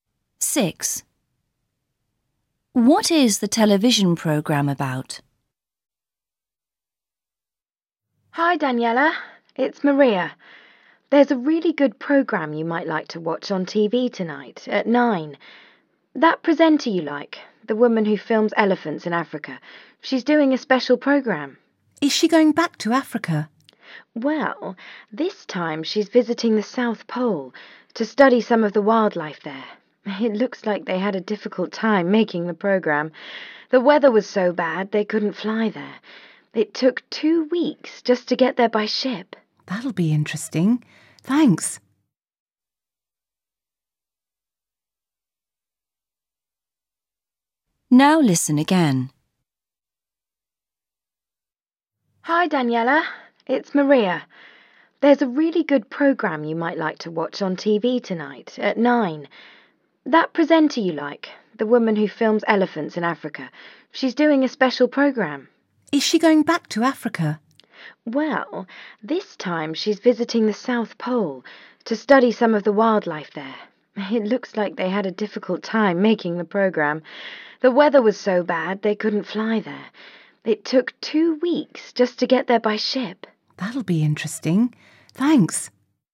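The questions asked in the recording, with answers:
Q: What is the television programme about?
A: Wildlife at the South Pole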